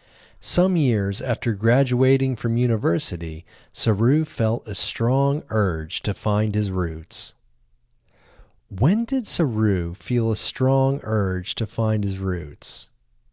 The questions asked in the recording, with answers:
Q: When did Saru feel a strong urge to find his roots?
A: Saru felt a strong urge to find his roots some years after graduating from university.